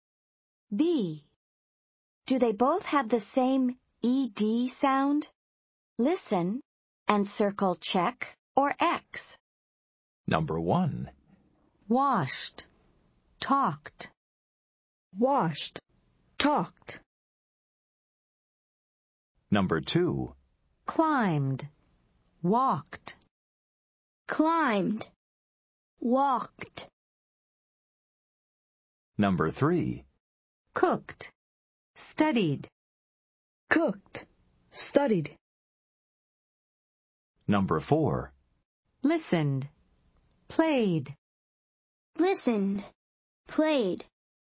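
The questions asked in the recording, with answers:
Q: Do they both have the same ED sound?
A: Yes (check): washed and talked both end in /t/

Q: Do they both have the same ED sound?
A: No (X): climbed ends in /d/, walked ends in /t/

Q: Do they both have the same ED sound?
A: No (X): cooked ends in /t/, studied ends in /d/

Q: Do they both have the same ED sound?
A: Yes (check): listened and played both end in /d/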